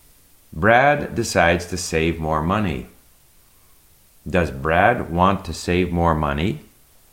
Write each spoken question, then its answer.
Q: Does Brad want to save more money?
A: Yes, Brad decides to save more money.